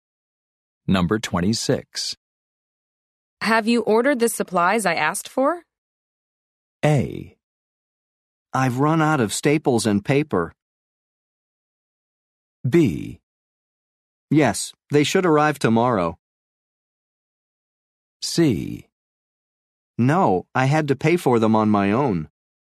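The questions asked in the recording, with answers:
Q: Have you ordered the supplies I asked for?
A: B: Yes, they should arrive tomorrow.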